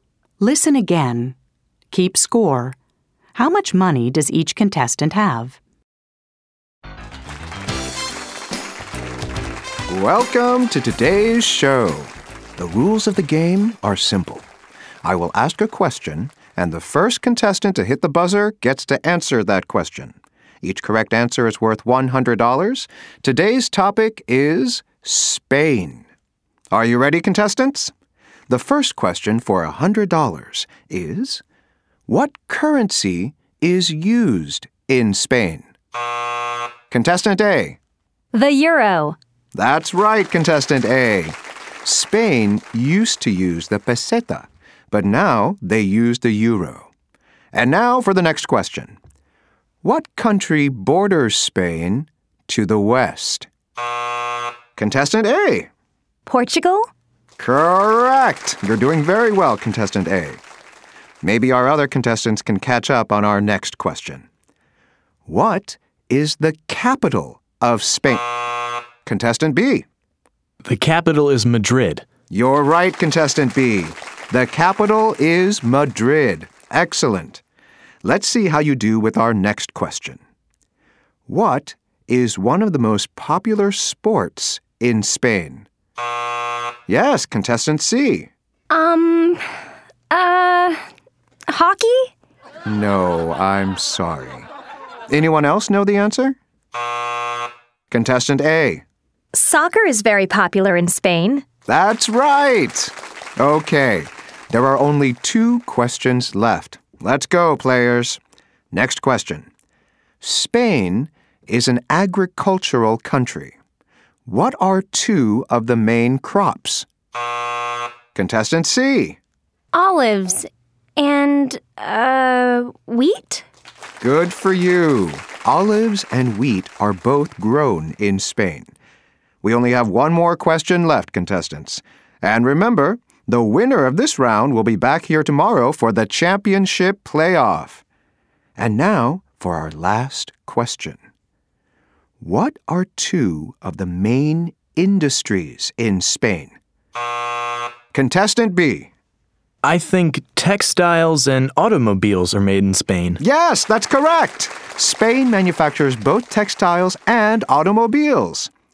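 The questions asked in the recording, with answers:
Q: How much money does each contestant have?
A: Contestant A: $300; Contestant B: $200; Contestant C: $100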